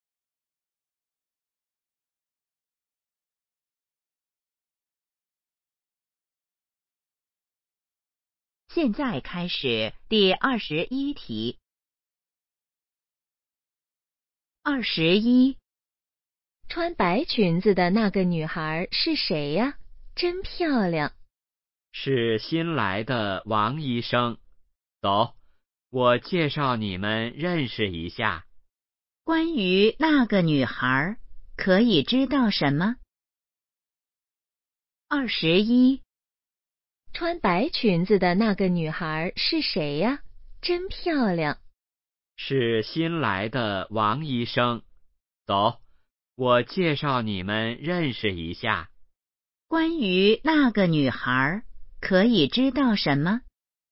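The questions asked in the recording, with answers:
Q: 关于那个女孩可以知道什么?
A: 她是新来的医生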